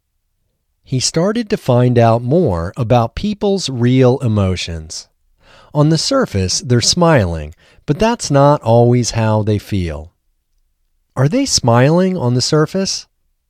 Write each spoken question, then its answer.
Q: Are they smiling on the surface?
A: Yes, they are smiling on the surface.